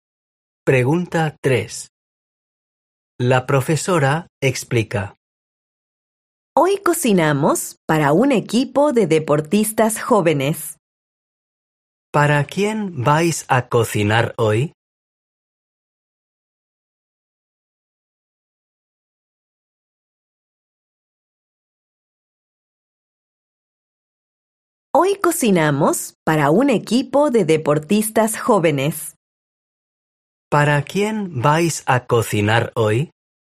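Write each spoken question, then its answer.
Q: ¿Para quién vais a cocinar hoy?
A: Para un equipo de deportistas jóvenes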